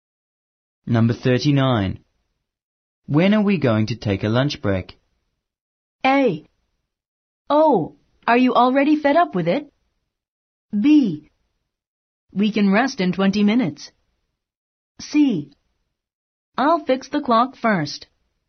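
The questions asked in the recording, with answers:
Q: When are we going to take a lunch break?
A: B: We can rest in 20 minutes.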